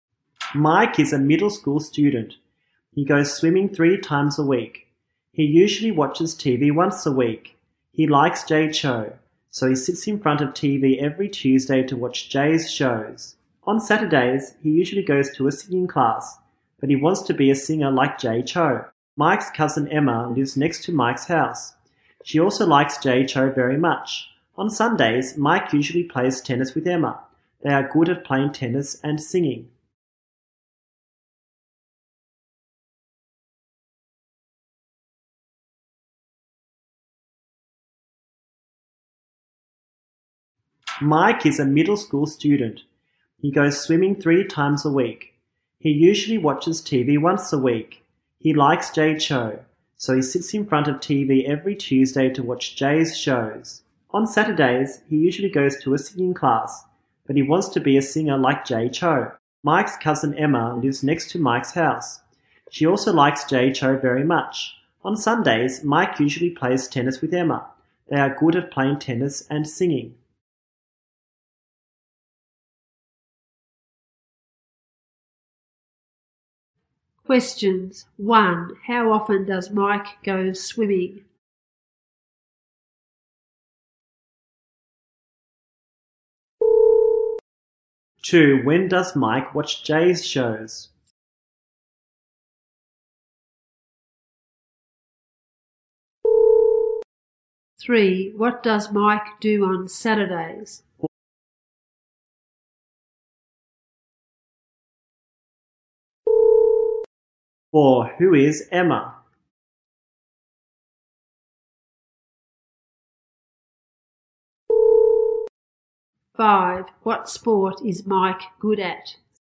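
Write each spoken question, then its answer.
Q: How often does Mike go swimming?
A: Three times a week.

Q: When does Mike watch Jay's shows?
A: Every Tuesday.

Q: What does Mike do on Saturdays?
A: He goes to a singing class.

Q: Who is Emma?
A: Mike's cousin.

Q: What sport is Mike good at?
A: Tennis.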